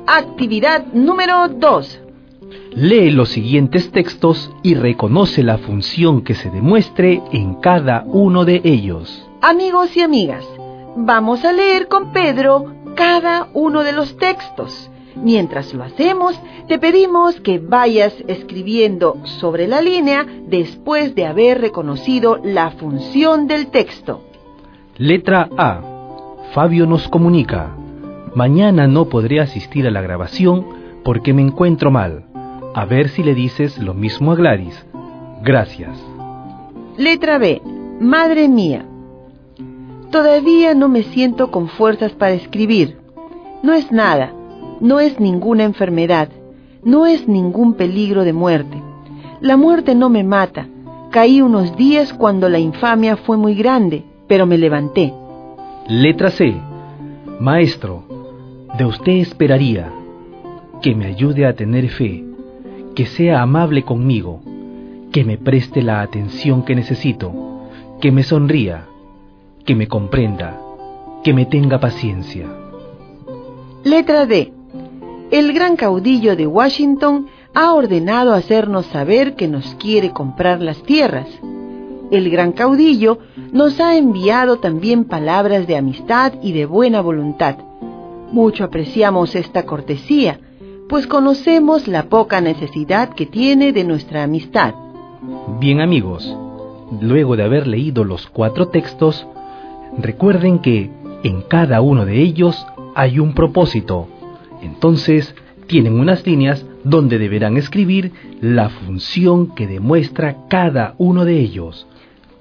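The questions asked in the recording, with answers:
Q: Lee los siguientes textos y reconoce la función que se demuestre en cada uno de ellos.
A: Función enunciativa o representativa

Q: Lee los siguientes textos y reconoce la función que se demuestre en cada uno de ellos.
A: Función expresiva

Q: Lee los siguientes textos y reconoce la función que se demuestre en cada uno de ellos.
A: Función apelativa o conativa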